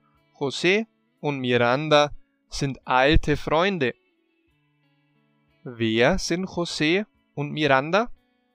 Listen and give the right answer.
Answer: Alte Freunde. Sie sind alte Freunde.